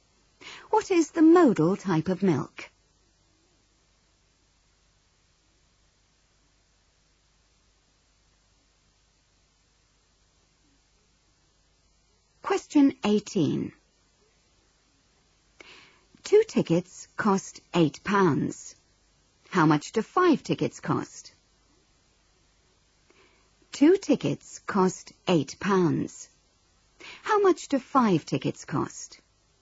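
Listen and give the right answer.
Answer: £20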